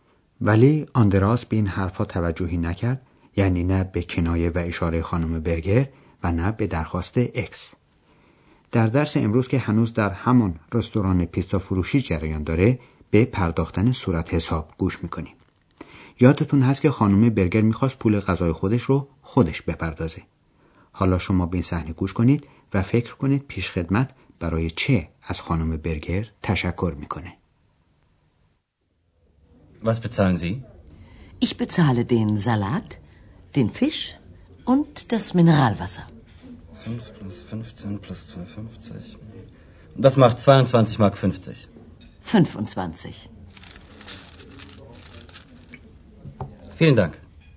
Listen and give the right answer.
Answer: پس تشکر پیشخدمت یا گارسون به خاطر انعامی بود که خانم برگر به او داد.